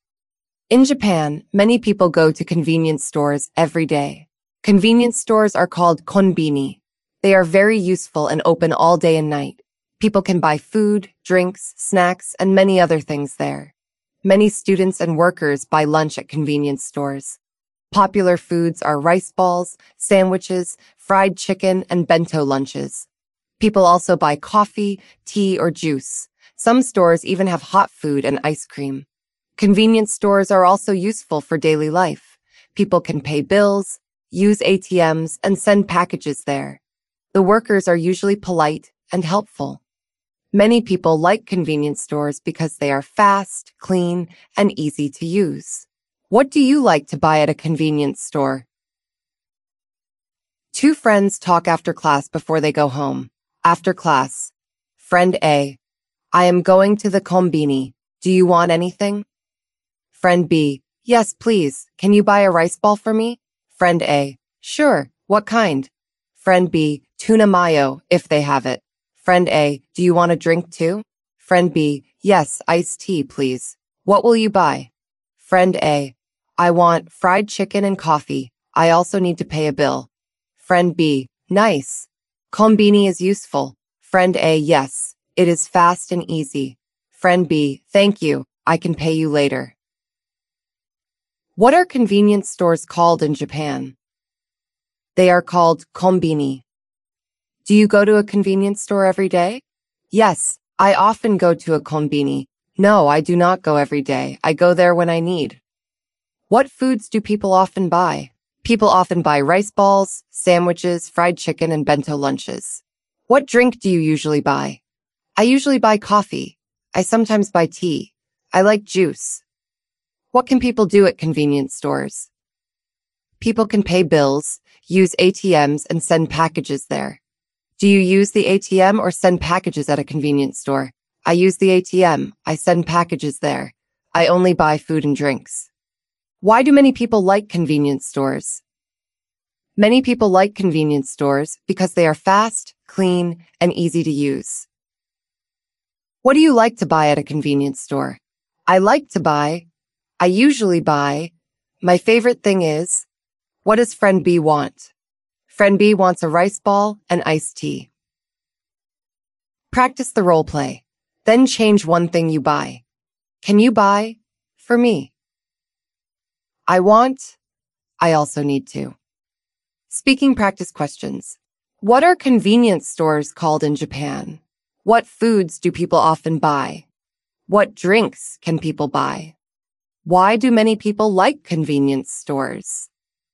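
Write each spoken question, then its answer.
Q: What are convenience stores called in Japan?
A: Konbini

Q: What foods do people often buy?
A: Rice balls, sandwiches, fried chicken, and bento lunches

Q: What drinks can people buy?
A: Coffee, tea, or juice

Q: Why do many people like convenience stores?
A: Because they are fast, clean, and easy to use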